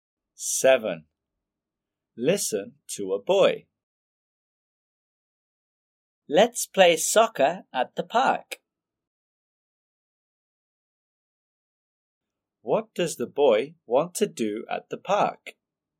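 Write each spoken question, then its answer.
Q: What does the boy want to do at the park?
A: play soccer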